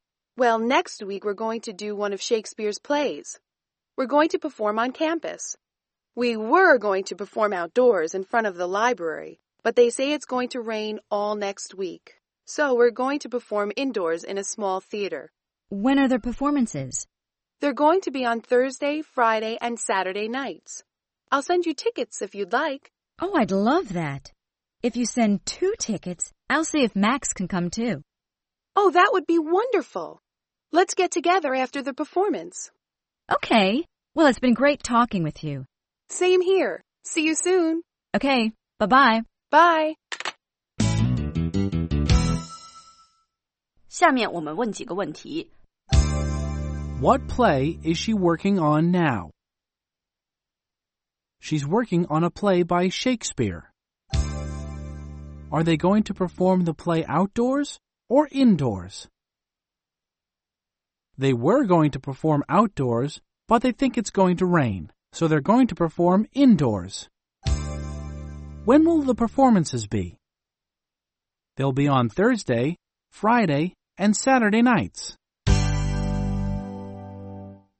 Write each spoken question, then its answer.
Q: What play is she working on now?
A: She's working on a play by Shakespeare.